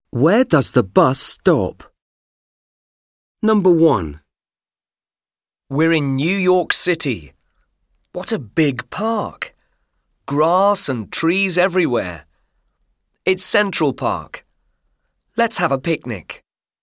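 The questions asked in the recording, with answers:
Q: Where does the bus stop?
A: Central Park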